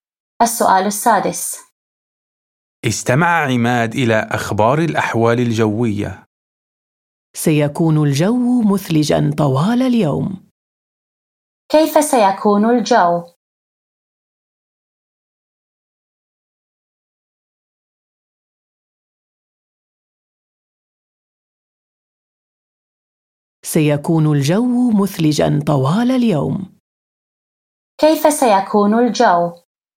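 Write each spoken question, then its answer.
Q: كيف سيكون الجو؟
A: مثلجاً طوال اليوم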